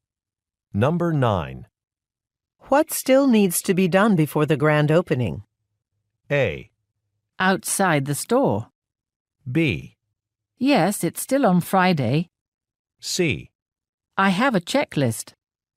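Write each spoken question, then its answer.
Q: What still needs to be done before the grand opening?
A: C: I have a checklist.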